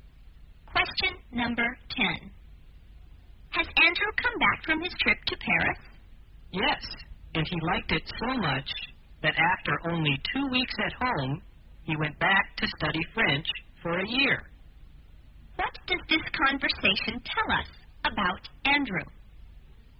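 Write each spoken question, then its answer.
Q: What does this conversation tell us about Andrew?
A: He is now in Paris, studying French for a year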